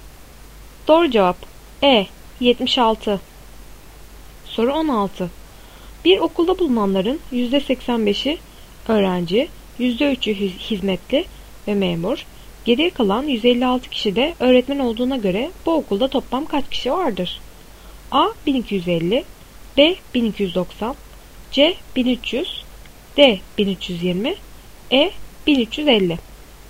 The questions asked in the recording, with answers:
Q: Bir okulda bulunanların %85'i öğrenci, %3'ü hizmetli ve memur, geriye kalan 156 kişi de öğretmen olduğuna göre bu okulda toplam kaç kişi vardır?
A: Doğru cevap C 1300.